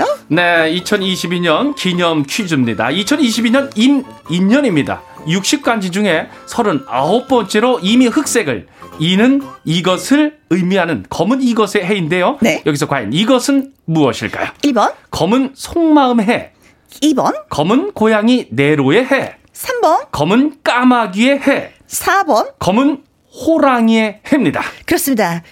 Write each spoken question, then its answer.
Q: 여기서 과연 이것은 무엇일까요?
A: 정답은 검은 호랑이의 해이고요